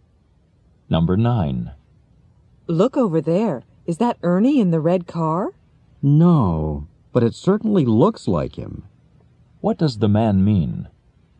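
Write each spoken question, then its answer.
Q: What does the man mean?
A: The person resembles Ernie but isn't him.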